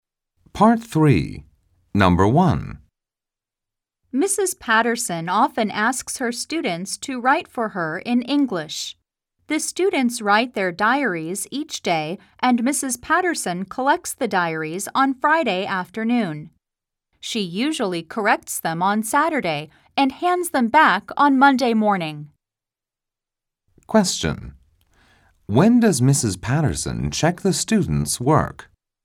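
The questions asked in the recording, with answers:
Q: When does Mrs. Patterson check the students' work?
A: On Saturday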